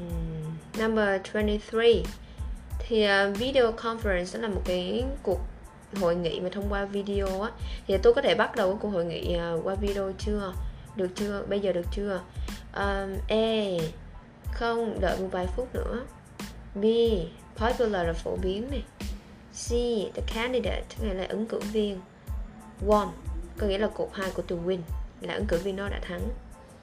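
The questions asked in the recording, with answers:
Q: Thì tôi có thể bắt đầu cái cuộc hội nghị qua video chưa?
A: A: Không, đợi một vài phút nữa.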